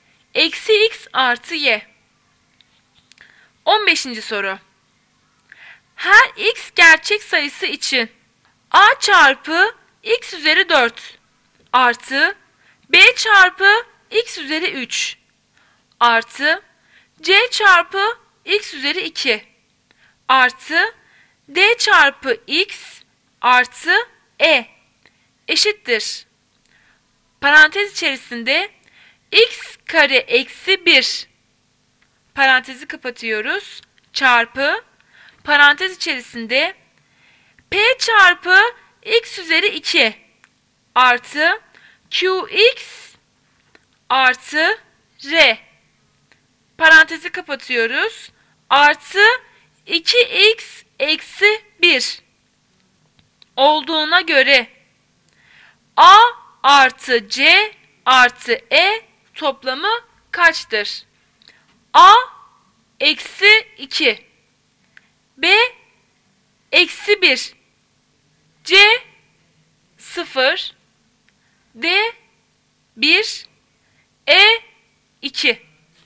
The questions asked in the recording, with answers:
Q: Parantez içerisinde x kare eksi 1 parantezi kapatıyoruz çarpı parantez içerisinde p çarpı x üzeri 2 artı qx artı r parantezi kapatıyoruz artı 2x eksi 1 olduğuna göre a artı c artı e toplamı kaçtır?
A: Cevap şıkkı B eksi 1.